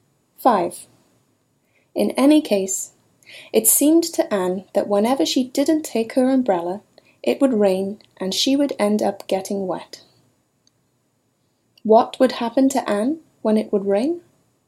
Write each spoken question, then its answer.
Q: What would happen to Anne when it would rain?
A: It would rain and she would end up getting wet.